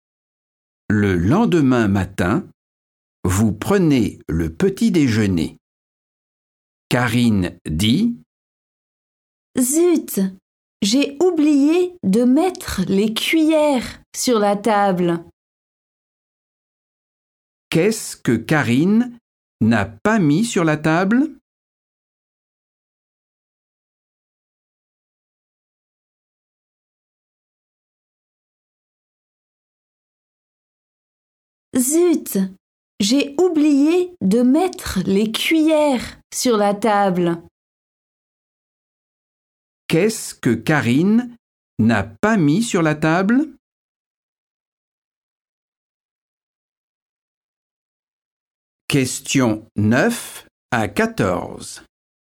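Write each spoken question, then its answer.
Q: Qu'est-ce que Karine n'a pas mis sur la table?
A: les cuillères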